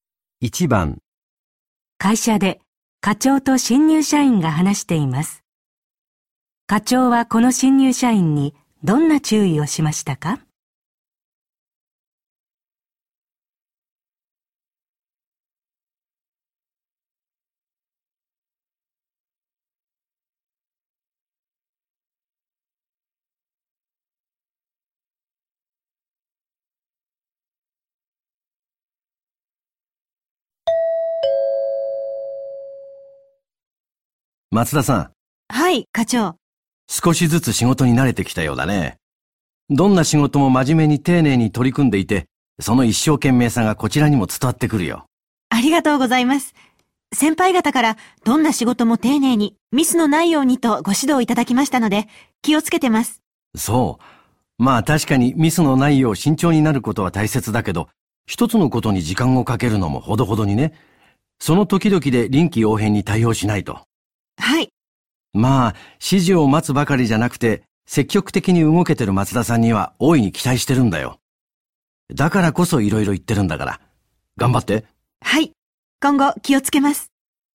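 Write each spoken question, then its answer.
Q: 課長はこの新入社員にどんな注意をしましたか?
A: 一つのことに時間をかけすぎず、臨機応変に対応すること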